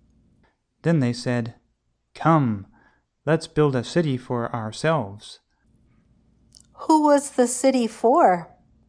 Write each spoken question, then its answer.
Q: Who was the city for?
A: The city was for the people.